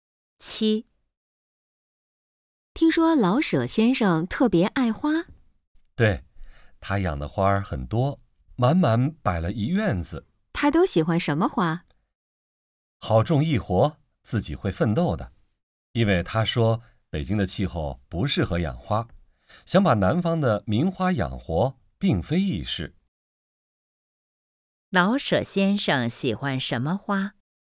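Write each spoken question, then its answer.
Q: 老舍先生喜欢什么花?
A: 好种易活、自己会奋斗的花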